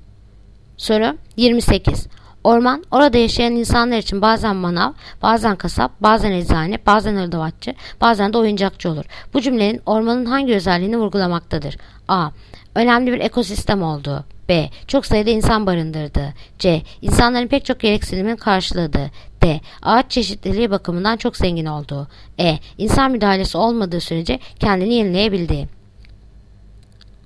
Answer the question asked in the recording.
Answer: Yanıt Ceyhan. İnsanların pek çok gereksinimlerini karşıladığı.